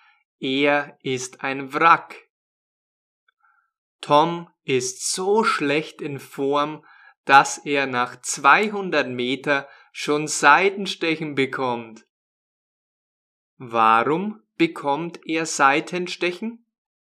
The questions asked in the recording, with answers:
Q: Warum bekommt er Seitenstechen?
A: Weil er schlecht in Form ist.